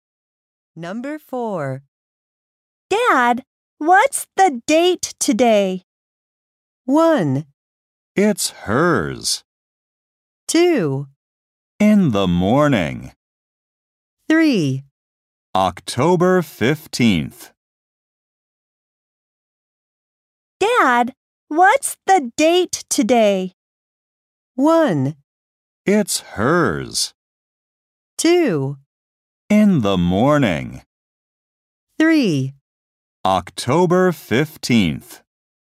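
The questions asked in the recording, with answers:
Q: Dad, what's the date today?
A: 3: October 15th.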